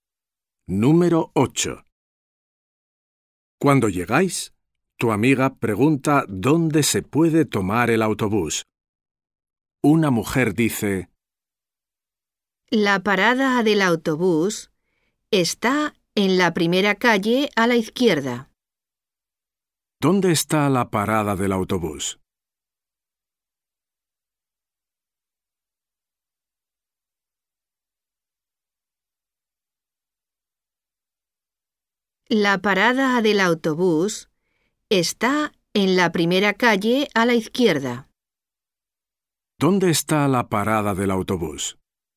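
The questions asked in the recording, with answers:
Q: ¿Dónde está la parada del autobús?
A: En la primera calle a la izquierda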